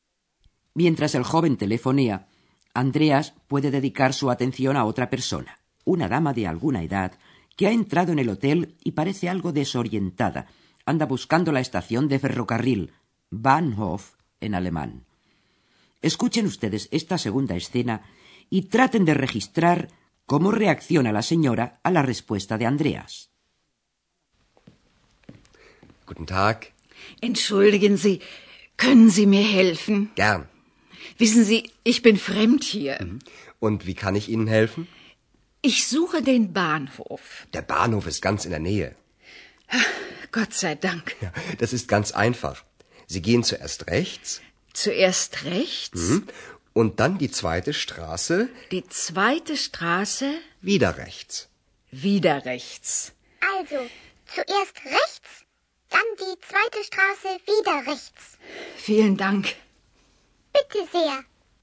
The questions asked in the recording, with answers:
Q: traten de registrar cómo reacciona la señora a la respuesta de Andreas.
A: La vieja señora reacciona aliviada ante la respuesta de Andreas y exclama, gracias a Dios.